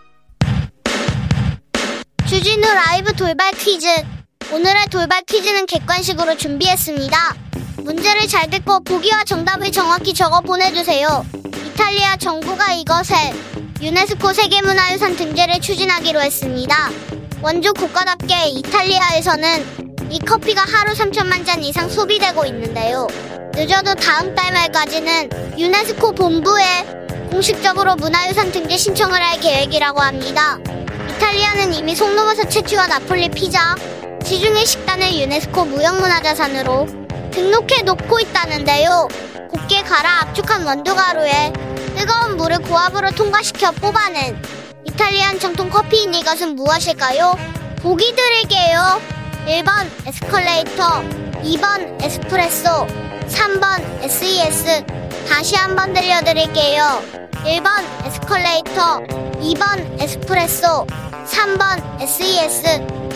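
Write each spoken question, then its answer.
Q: 곱게 갈아 압축한 원두가루에 뜨거운 물을 고압으로 통과시켜 뽑아낸 이탈리안 정통 커피인 이것은 무엇일까요?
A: 2: 에스프레소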